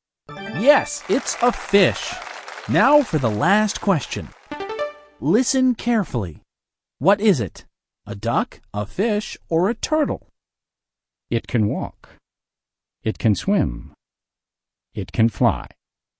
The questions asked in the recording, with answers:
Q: What is it?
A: It's a duck. A duck can swim, and a duck can walk, and a duck can fly.